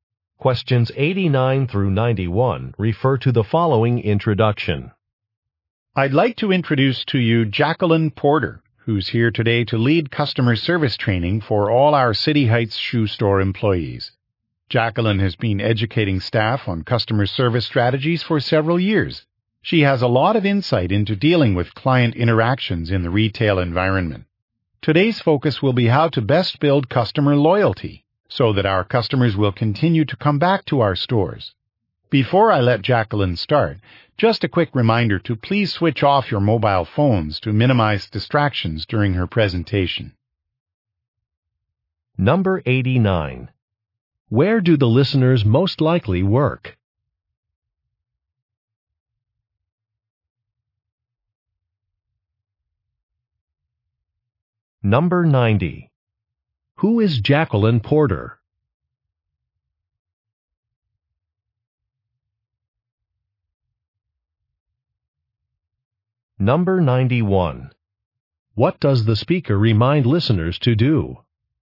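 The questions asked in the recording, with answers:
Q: Where do the listeners most likely work?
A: At a shoe store

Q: Who is Jacqueline Porter?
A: A customer service trainer

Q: What does the speaker remind listeners to do?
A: Turn off their mobile phones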